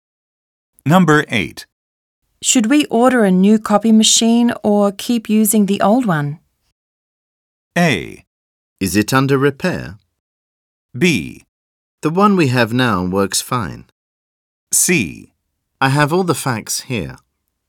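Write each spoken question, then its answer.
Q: Should we order a new copy machine or keep using the old one?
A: B: The one we have now works fine.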